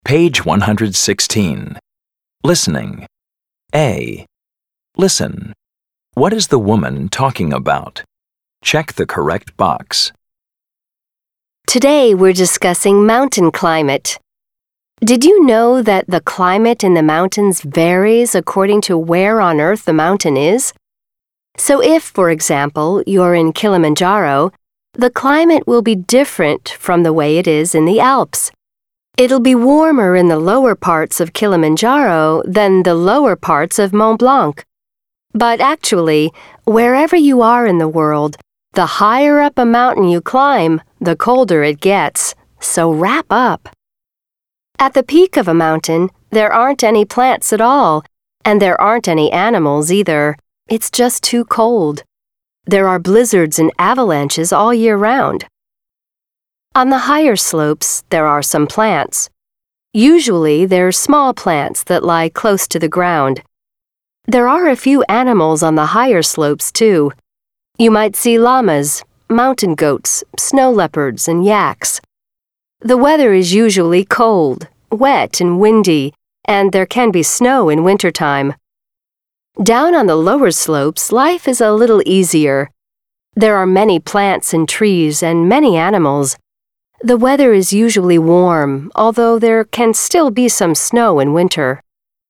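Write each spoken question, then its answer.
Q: What is the woman talking about?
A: Mountain climate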